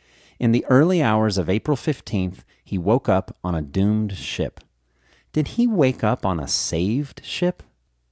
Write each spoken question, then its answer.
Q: Did he wake up on a saved ship?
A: No, he didn't wake up on a saved ship.